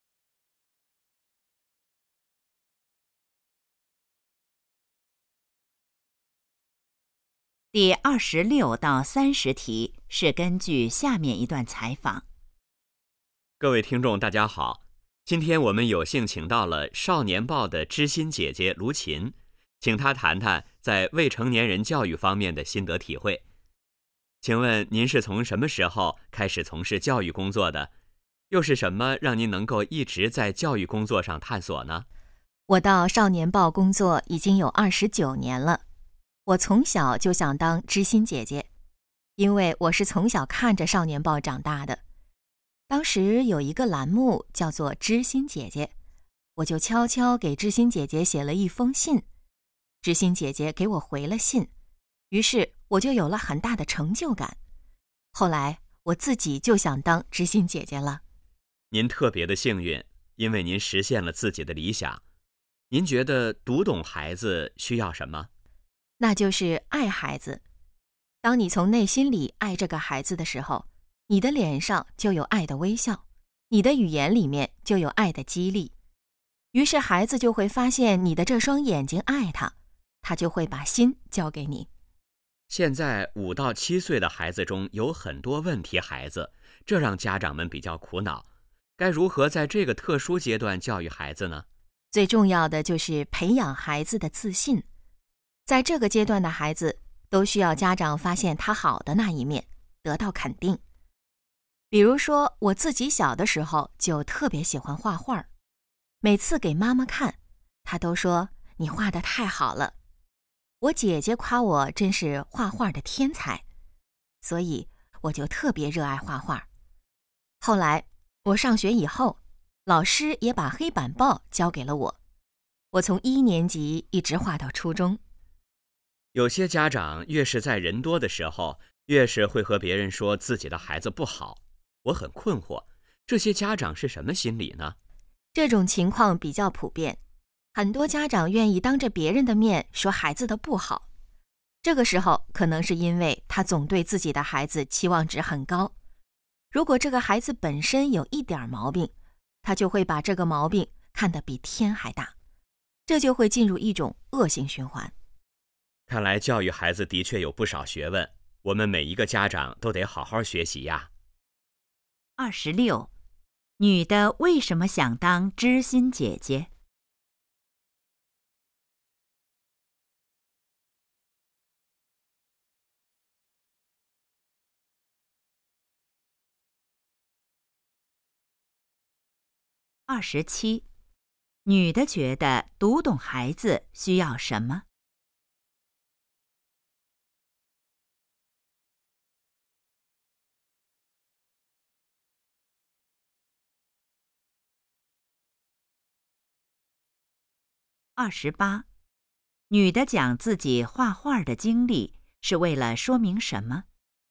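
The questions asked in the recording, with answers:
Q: 女的为什么想当知心姐姐?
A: 小时候给知心姐姐写信得到回信,有很大成就感

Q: 女的觉得读懂孩子需要什么?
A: 爱孩子

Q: 女的讲自己画画的经历是为了说明什么?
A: 要培养孩子的自信,肯定孩子

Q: 为什么有些家长当着别人的面批评孩子?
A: 对孩子期望值太高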